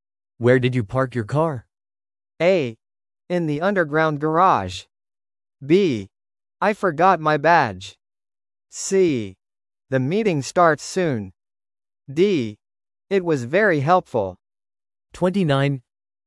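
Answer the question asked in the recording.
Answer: A: In the underground garage.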